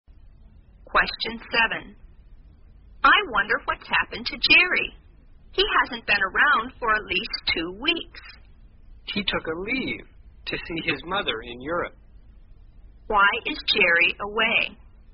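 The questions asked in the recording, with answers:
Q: Why is Jerry away?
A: He took a leave to see his mother in Europe.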